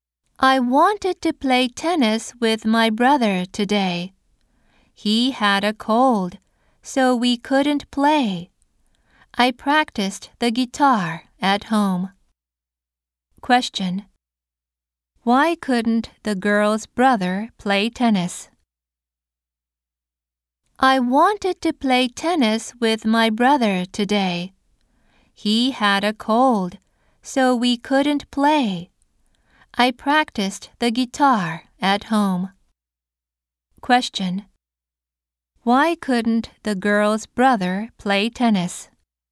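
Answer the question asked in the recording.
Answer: Because he had a cold.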